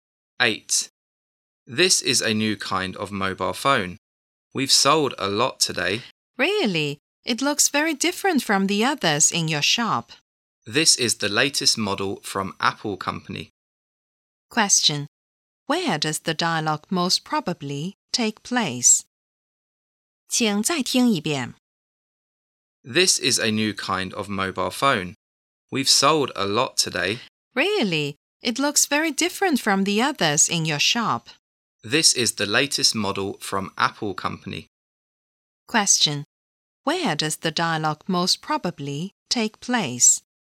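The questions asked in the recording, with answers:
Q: Where does the dialogue most probably take place?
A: In a mobile phone shop.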